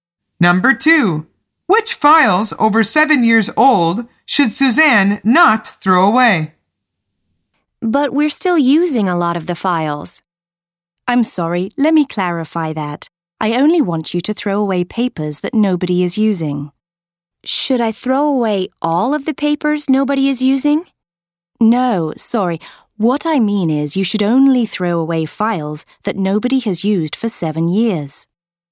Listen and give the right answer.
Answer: The answer is the files that people are using.